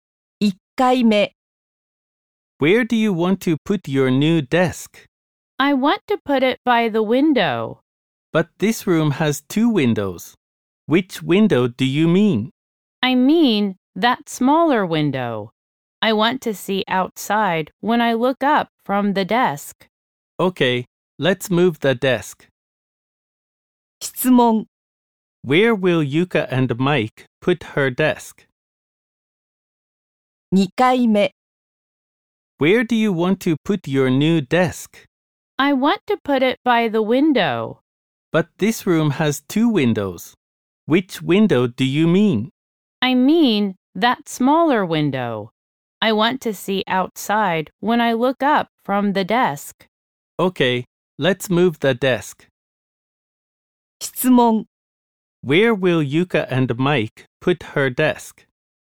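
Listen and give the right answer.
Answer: By the smaller window.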